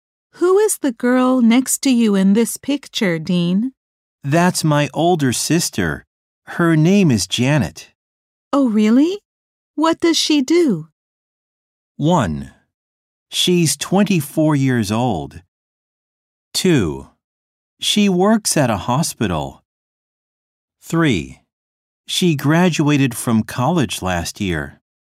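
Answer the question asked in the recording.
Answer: 2: She works at a hospital.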